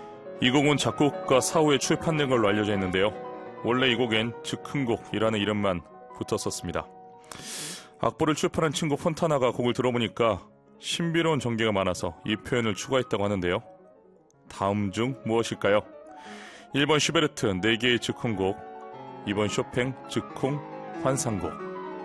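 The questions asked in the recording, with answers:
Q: 다음 중 무엇일까요? 1번 슈베르트 4개의 즉흥곡, 2번 쇼팽 즉흥 환상곡.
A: 2번: 쇼팽 즉흥 환상곡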